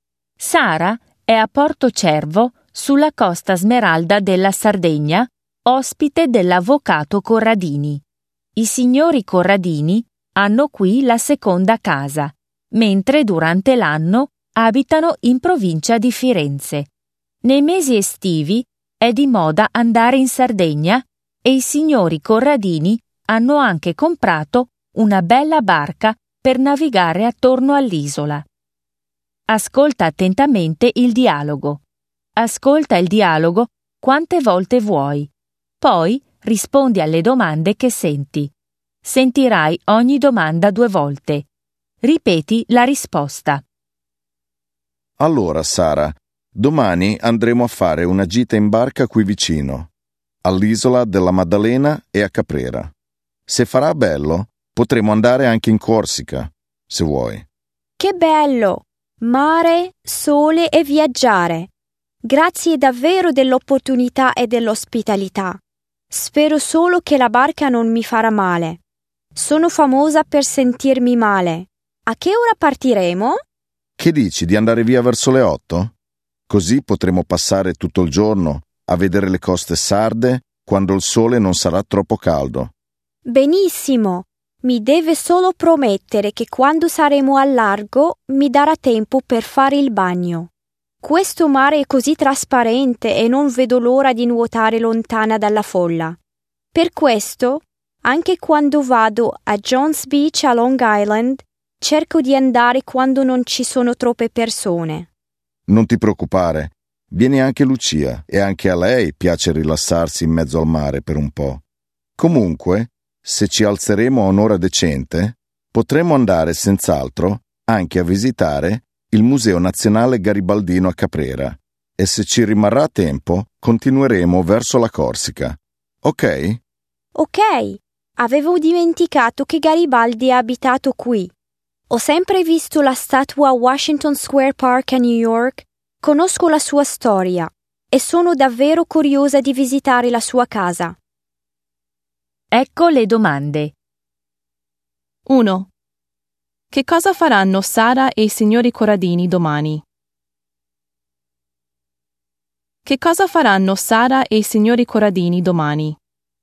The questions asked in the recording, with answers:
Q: Che cosa faranno Sara e i signori Corradini domani?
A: Faranno una gita in barca.